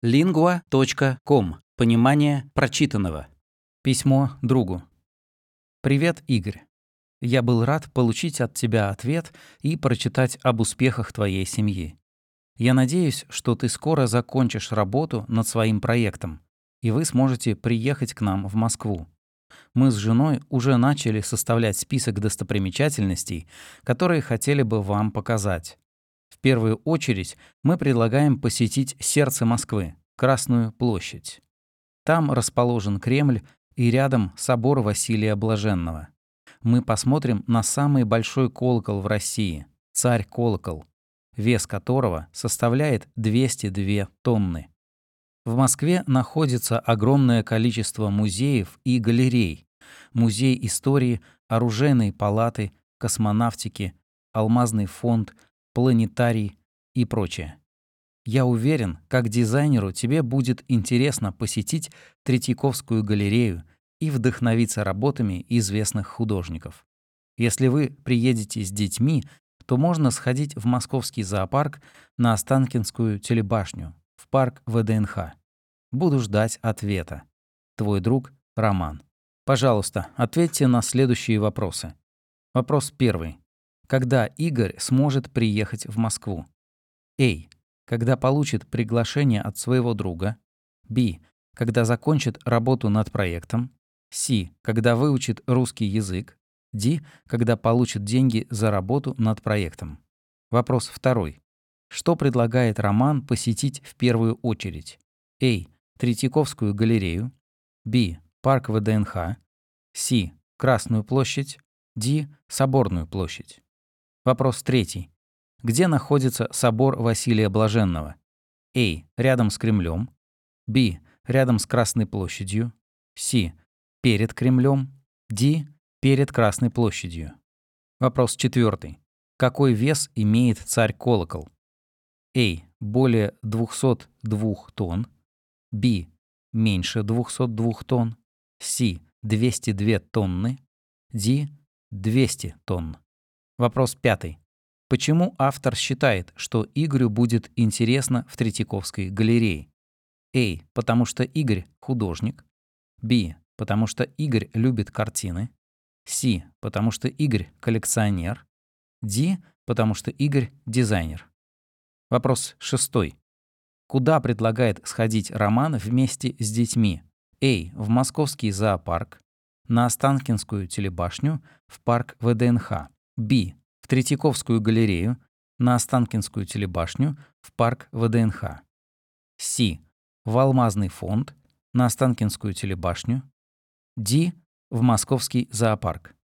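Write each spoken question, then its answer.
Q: Когда Игорь сможет приехать в Москву?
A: B: Когда закончит работу над проектом?

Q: Что предлагает Роман посетить в первую очередь?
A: C: Красную площадь?

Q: Какой вес имеет царь-колокол?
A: C: 202 тонны.

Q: Почему автор считает, что Игорю будет интересно в Третьяковской галерее?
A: D: Потому что Игорь — дизайнер.

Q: Куда предлагает сходить Роман вместе с детьми?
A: A: В московский зоопарк. На Останкинскую телебашню, в парк ВДНХ.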